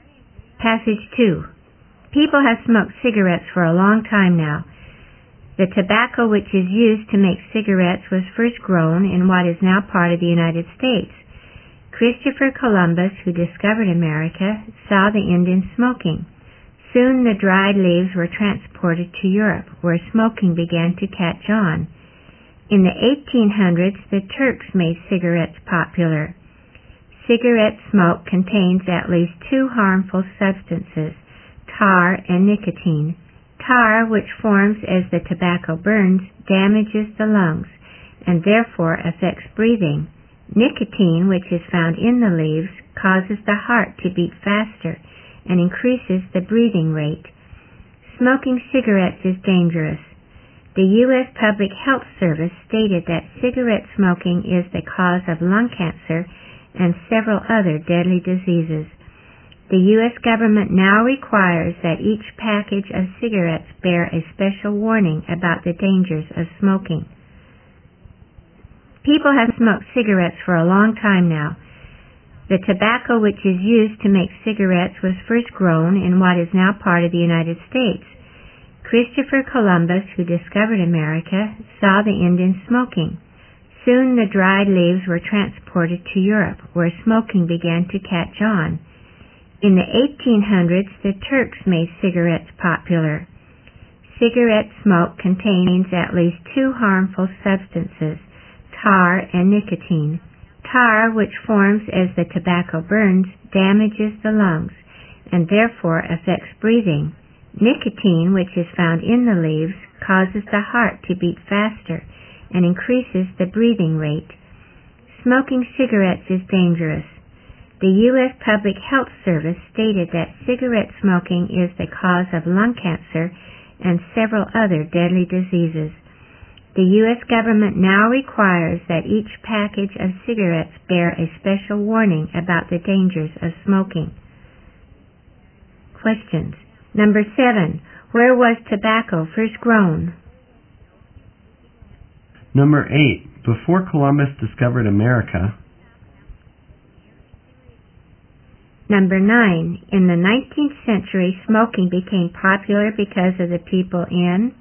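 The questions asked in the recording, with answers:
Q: Where was tobacco first grown?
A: In what is now part of the United States

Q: In the 19th century, smoking became popular because of the people in...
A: Turkey (the Turks)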